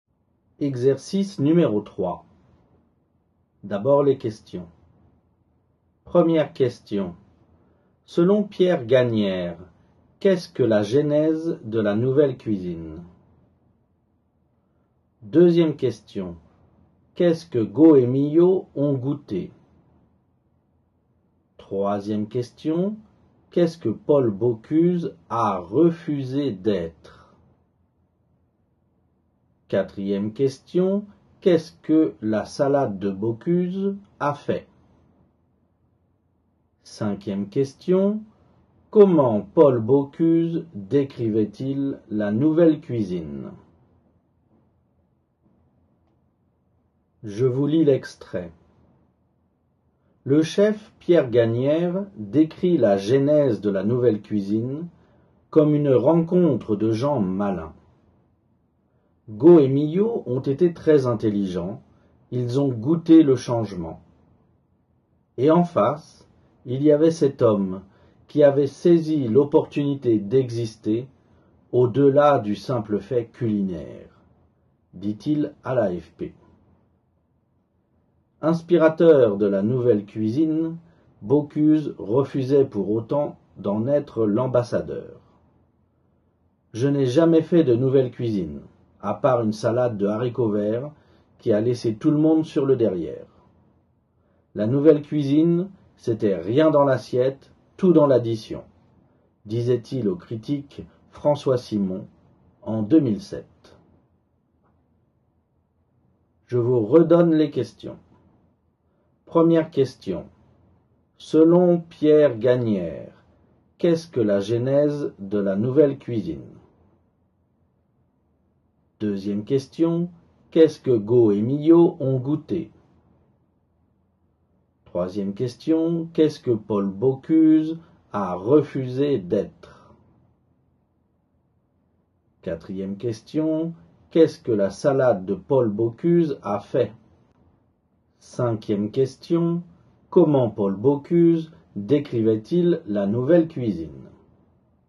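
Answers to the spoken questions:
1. Une rencontre de gens malins
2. Le changement
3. L'ambassadeur de la nouvelle cuisine
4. Elle a laissé tout le monde sur le derrière
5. Rien dans l'assiette, tout dans l'addition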